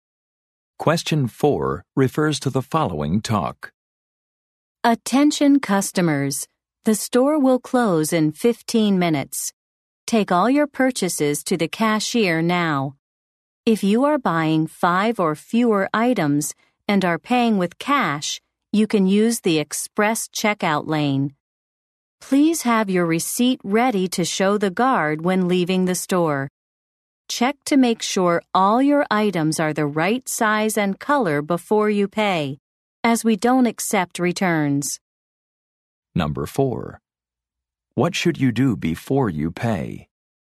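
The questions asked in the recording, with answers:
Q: What should you do before you pay?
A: Check that all items are the right size and color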